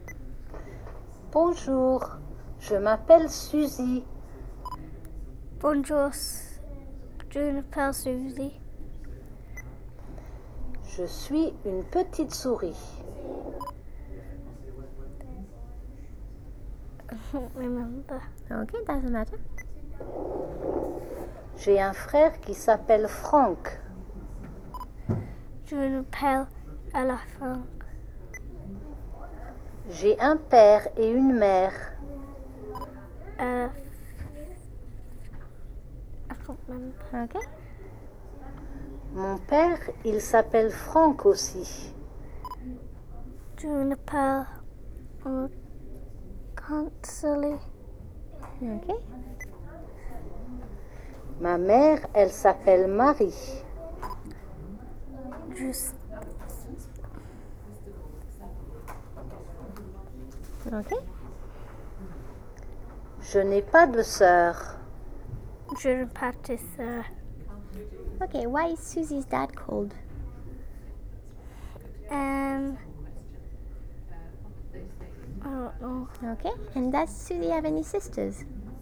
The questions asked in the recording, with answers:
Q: Ok, and does Susie have any sisters?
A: No.